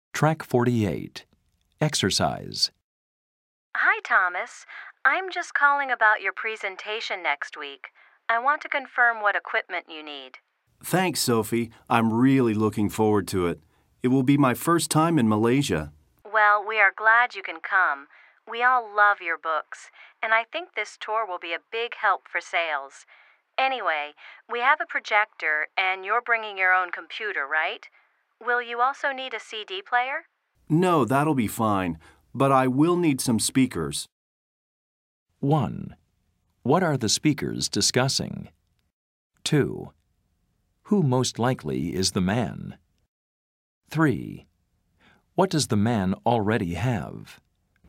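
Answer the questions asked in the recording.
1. The equipment the man needs for his presentation
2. An author
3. His own computer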